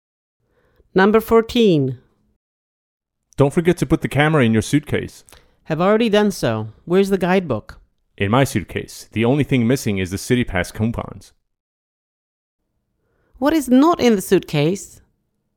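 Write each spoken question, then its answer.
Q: What is not in the suitcase?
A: The City Pass coupons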